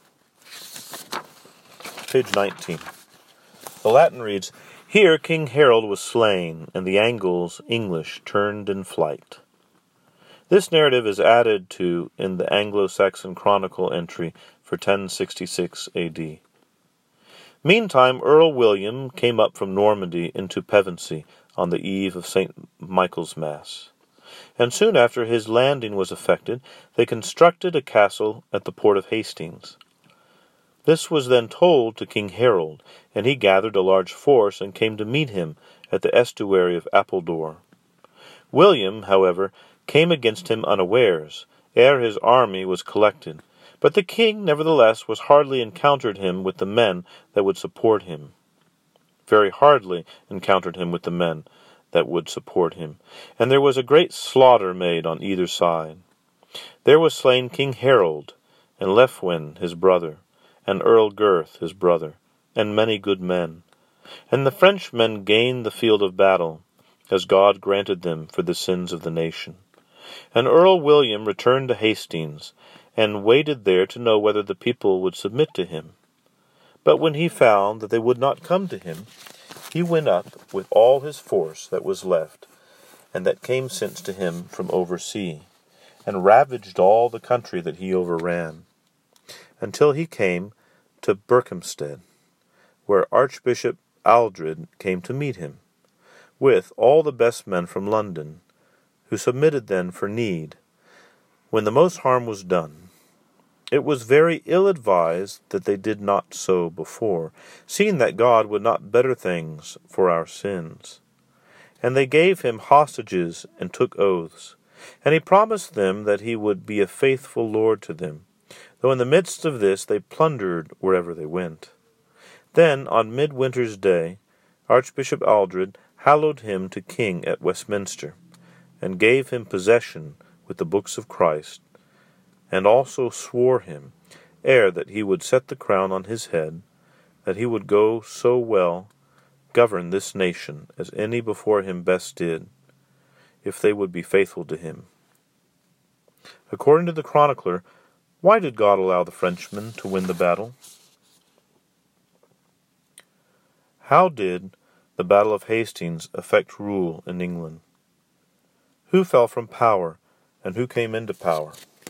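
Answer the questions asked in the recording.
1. For the sins of the nation
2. King Harold fell; Duke William came into power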